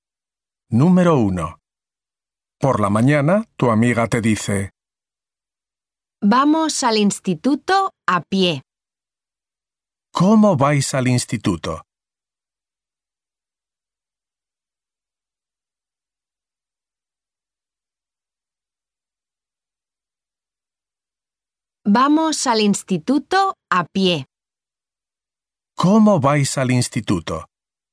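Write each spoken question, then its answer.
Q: ¿Cómo vais al instituto?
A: A pie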